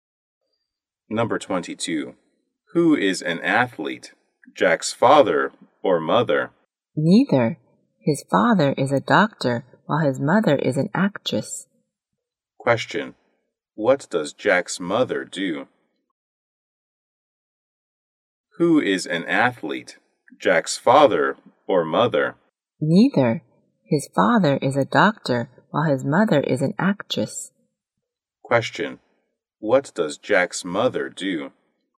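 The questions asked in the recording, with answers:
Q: What does Jack's mother do?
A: An actress.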